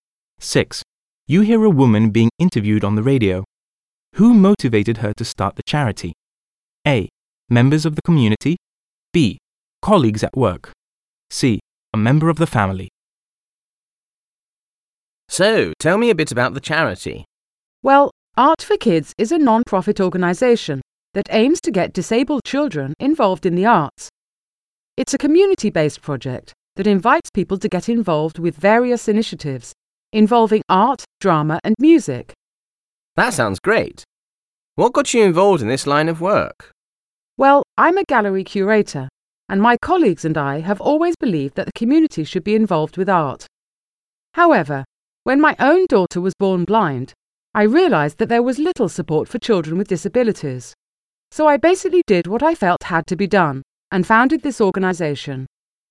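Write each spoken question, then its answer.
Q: Who motivated her to start the charity?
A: C: A member of the family.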